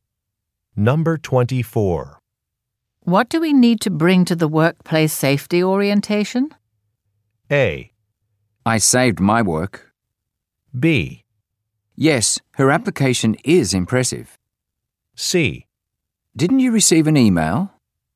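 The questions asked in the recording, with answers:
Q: What do we need to bring to the workplace safety orientation?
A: C: Didn't you receive an email?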